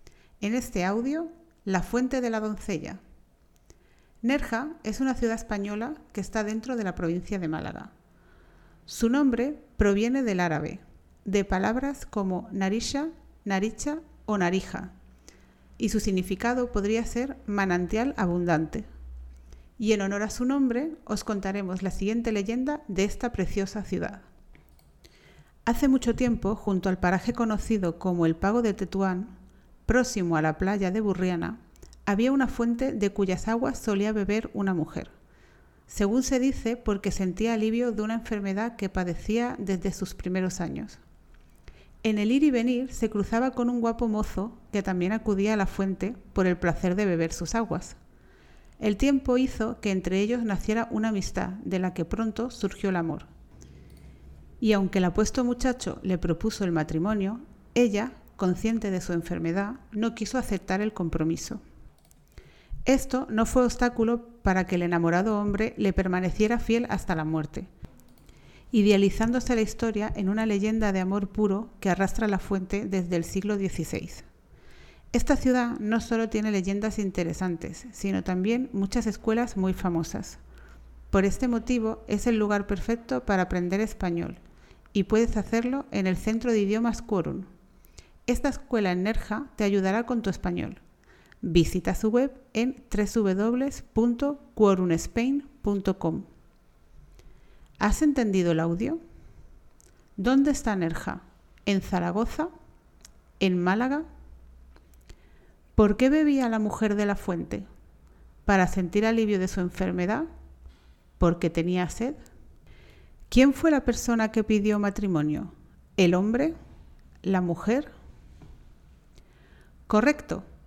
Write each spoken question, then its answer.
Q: ¿Dónde está Nerja?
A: Málaga

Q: ¿Quién fue la persona que pidió matrimonio?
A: el hombre